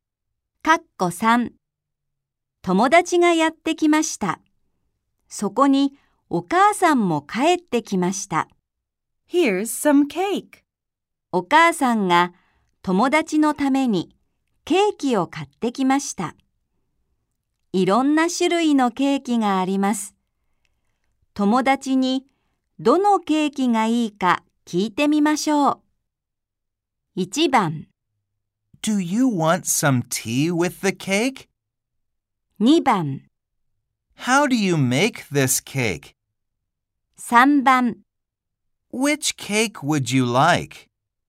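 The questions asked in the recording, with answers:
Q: 友達にどのケーキがいいか聞いてみましょう。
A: 3: Which cake would you like?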